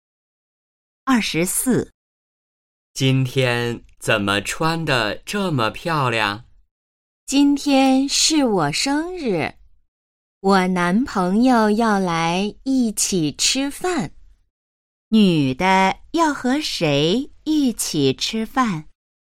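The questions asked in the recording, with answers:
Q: 女的要和谁一起吃饭?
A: 男朋友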